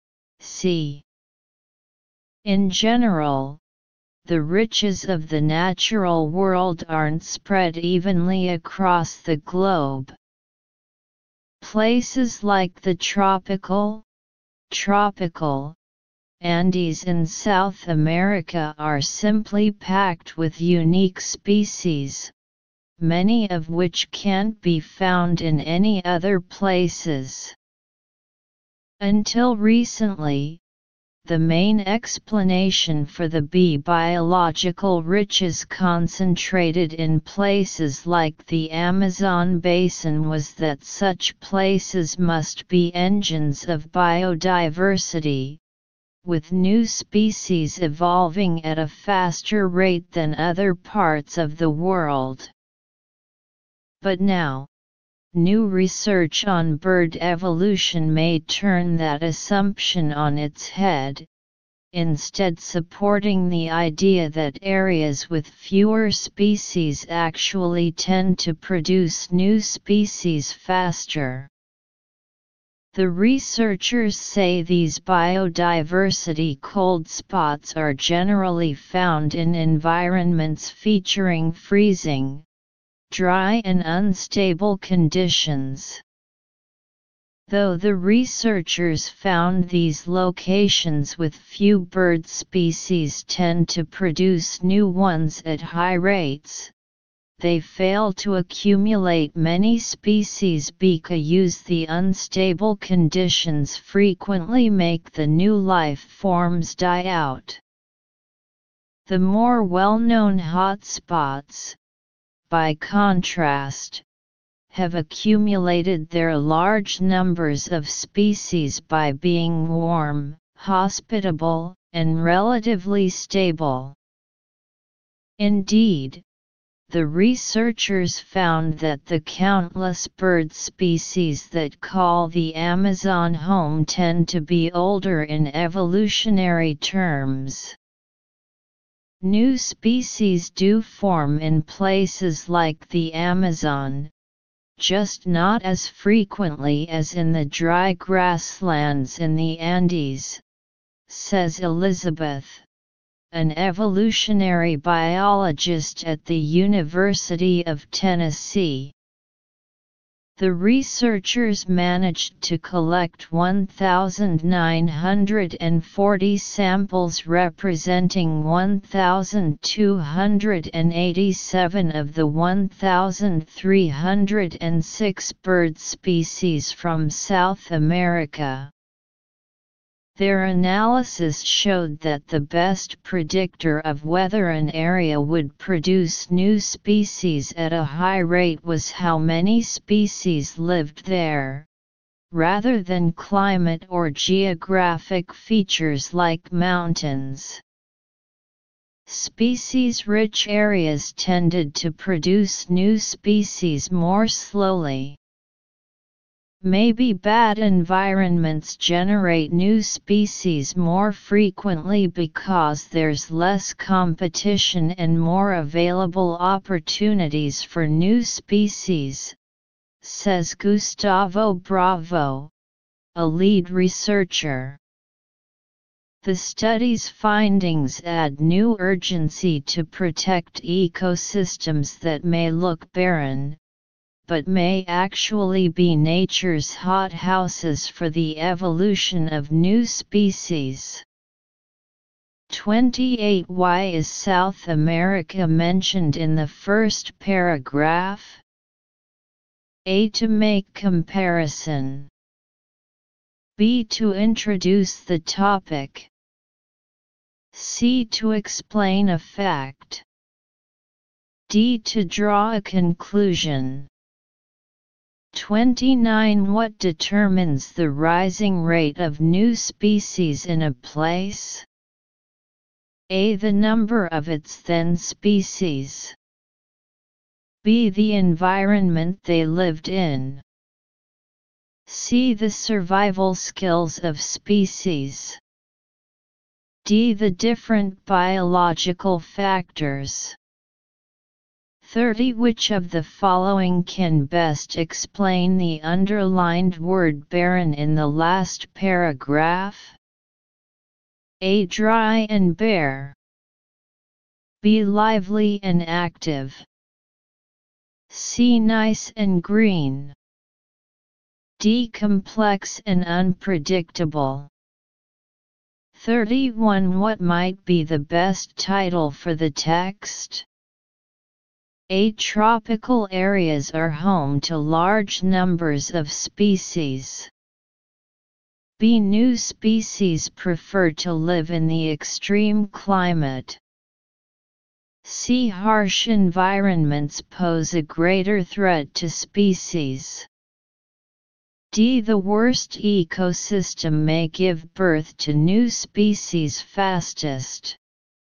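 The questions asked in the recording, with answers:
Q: What determines the rising rate of new species in a place?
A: A: The number of its then species.

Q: Which of the following can best explain the underlined word barren in the last paragraph?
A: A: Dry and bare.

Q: What might be the best title for the text?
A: D: The worst ecosystem may give birth to new species fastest.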